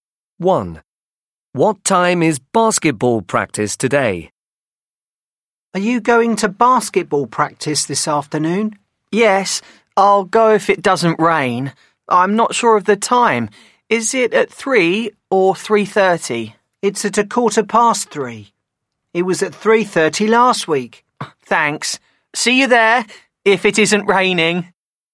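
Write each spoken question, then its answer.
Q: What time is basketball practice today?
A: 3:15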